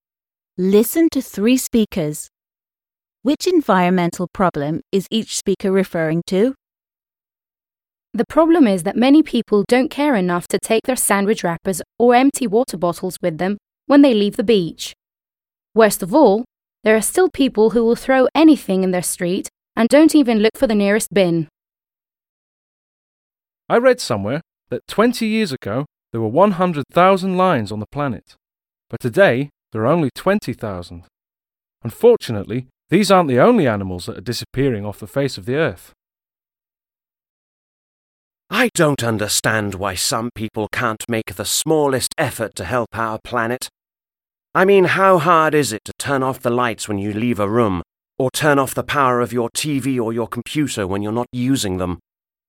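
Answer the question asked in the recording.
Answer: Speaker 1: rubbish; Speaker 2: endangered species; Speaker 3: energy waste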